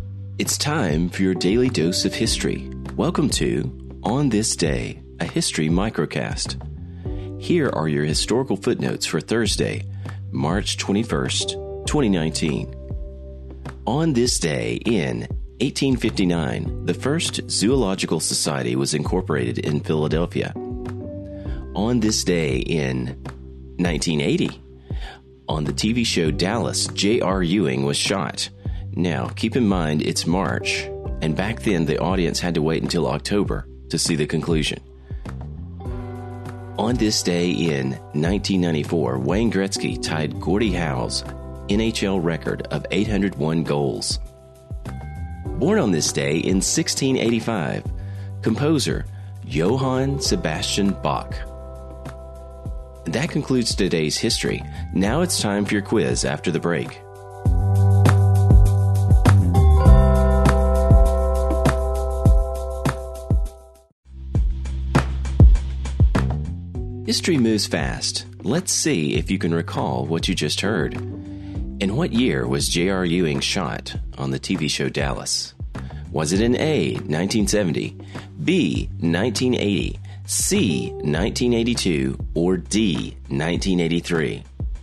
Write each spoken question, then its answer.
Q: In what year was J.R. Ewing shot on the TV show Dallas?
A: The answer? B, 1980.